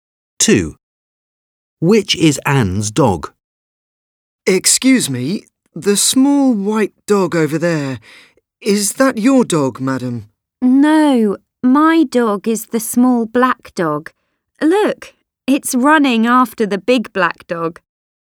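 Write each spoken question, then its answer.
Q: Which is Anne's dog?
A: The small black dog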